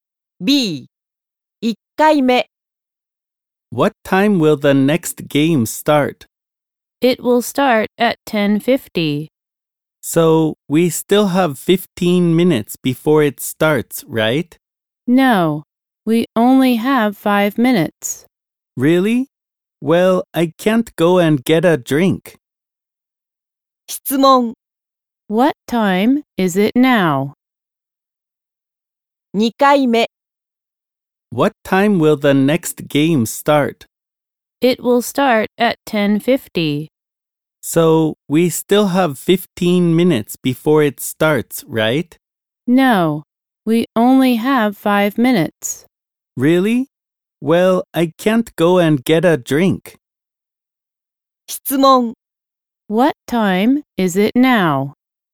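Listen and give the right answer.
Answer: 10:45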